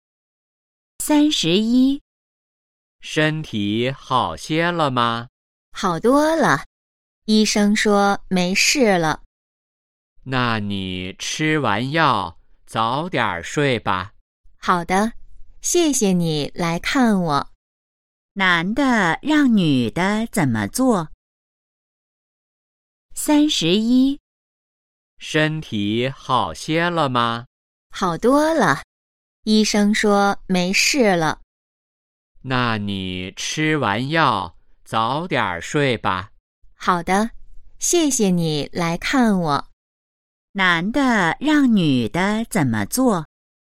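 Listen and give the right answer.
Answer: 吃完药早点睡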